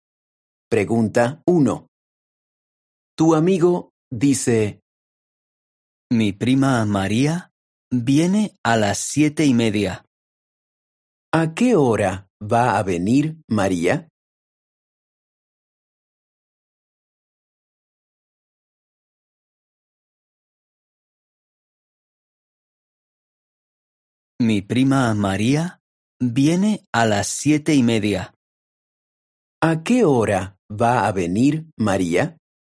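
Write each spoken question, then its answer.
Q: ¿A qué hora va a venir María?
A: a las 7:30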